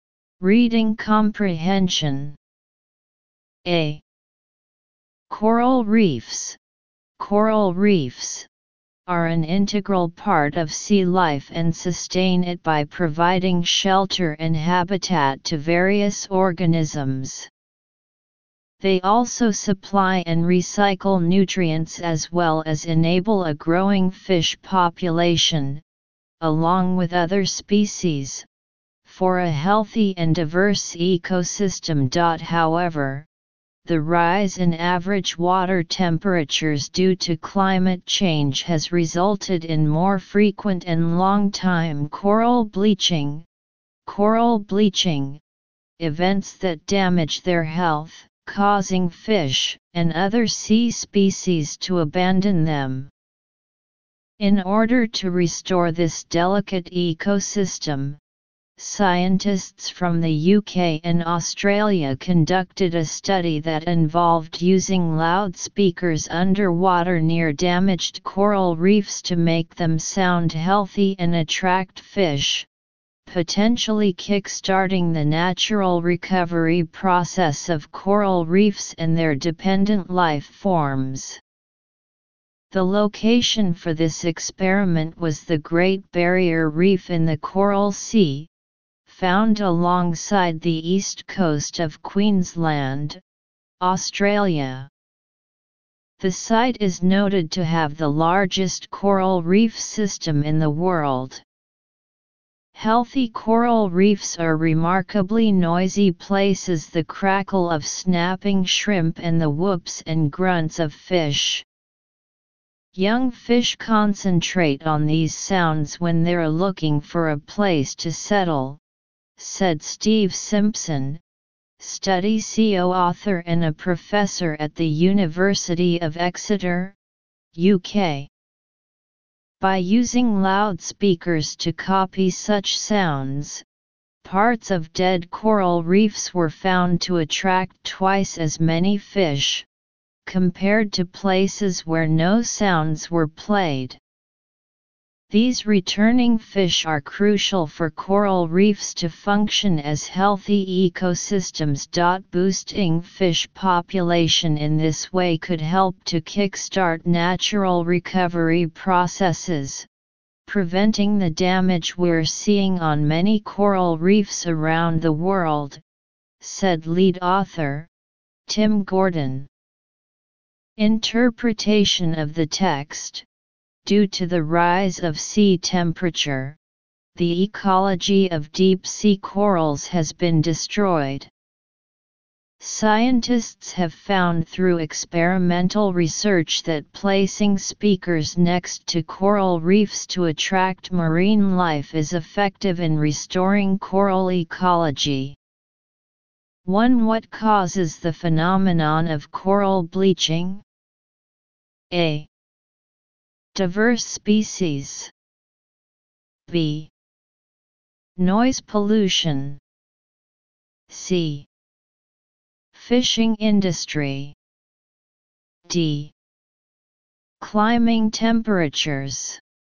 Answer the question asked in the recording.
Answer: Choose D